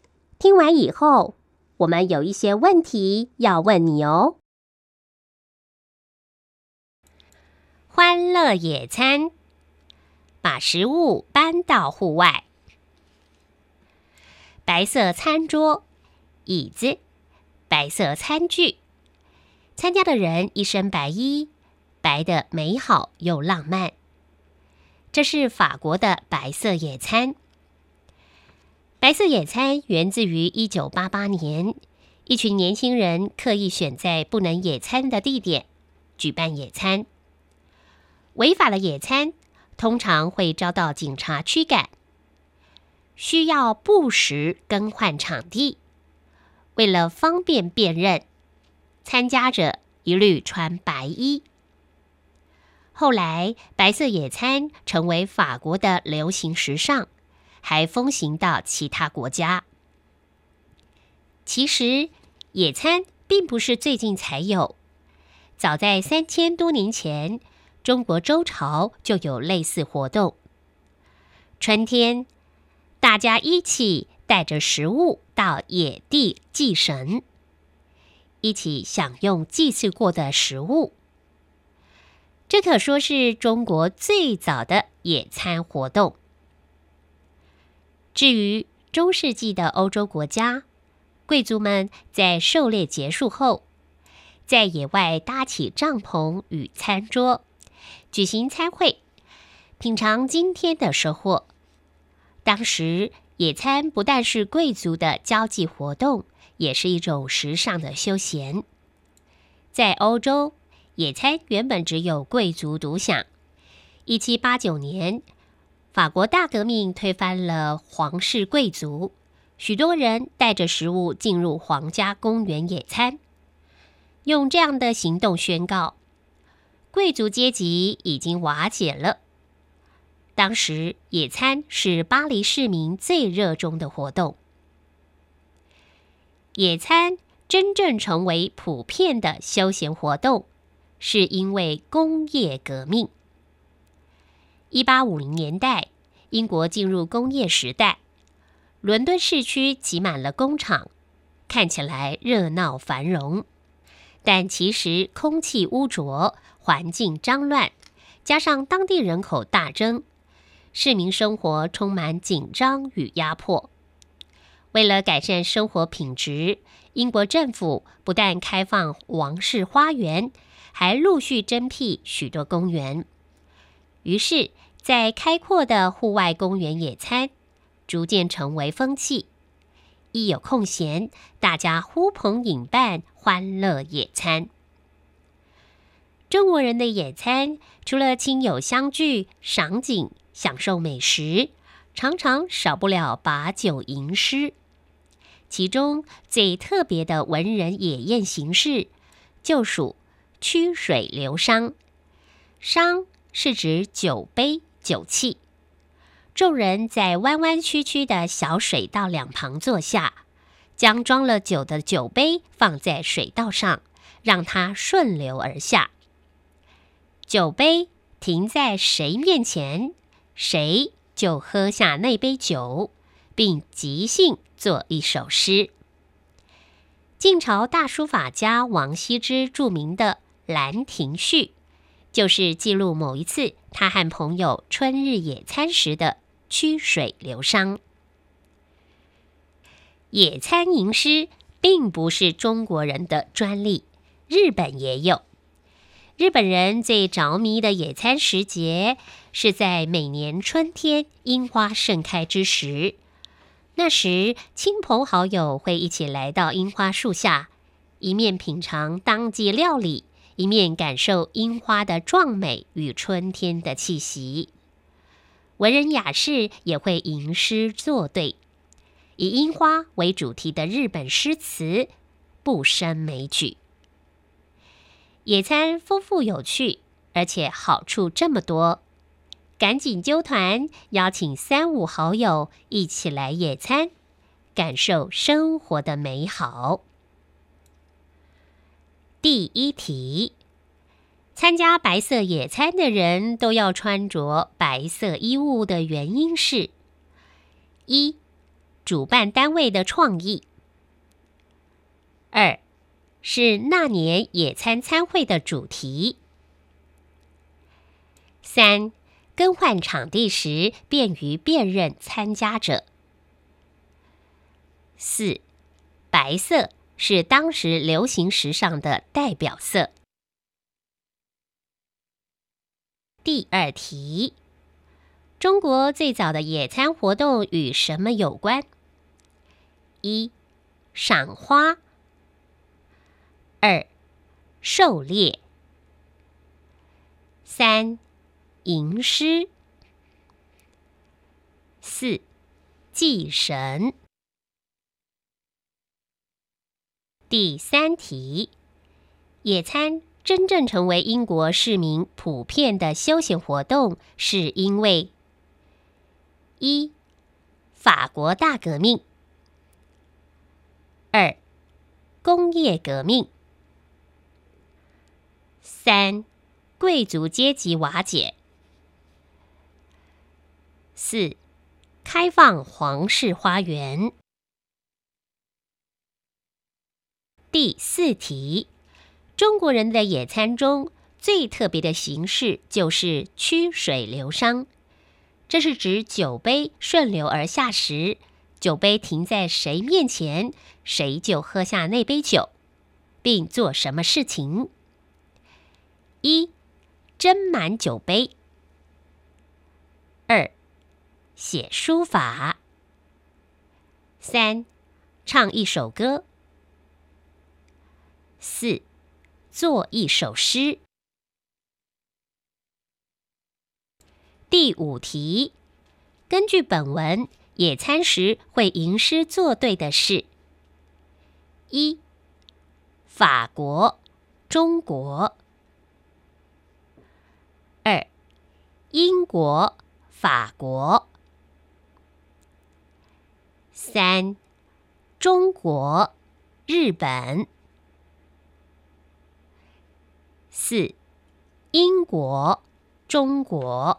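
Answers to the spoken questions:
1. 三: 更换场地时便于辨认参加者
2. 四: 祭神
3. 二: 工业革命
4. 四: 做一首诗
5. 三: 中国、日本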